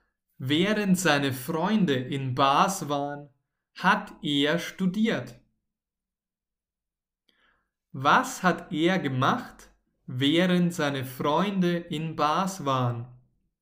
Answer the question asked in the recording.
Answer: Er hat studiert. Er hat gelernt.